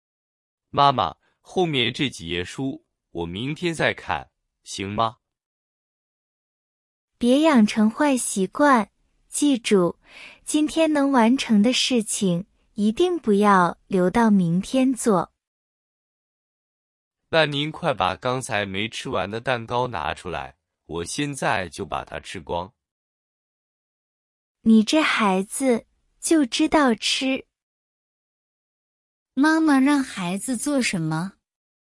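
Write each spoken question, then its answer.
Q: 妈妈让孩子做什么?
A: 今天把这几页书看完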